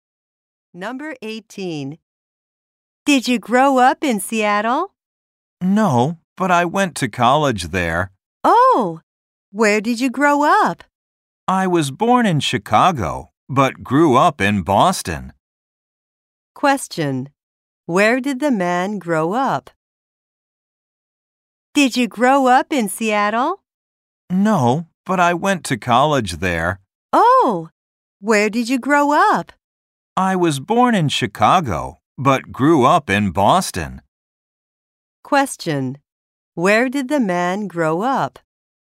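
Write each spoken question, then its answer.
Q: Where did the man grow up?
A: In Boston.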